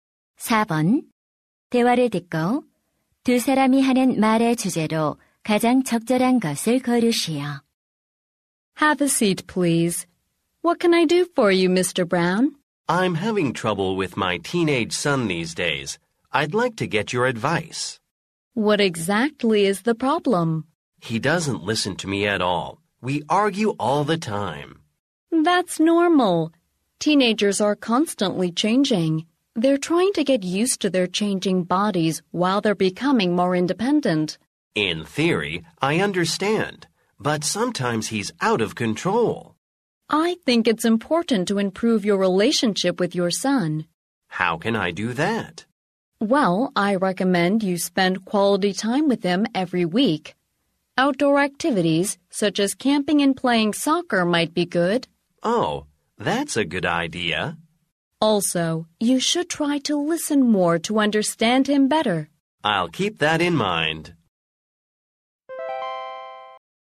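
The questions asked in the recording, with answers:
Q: 대화를 듣고 두 사람이 하는 말의 주제로 가장 적절한 것을 고르시오.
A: 십대 아들과의 관계 개선 방법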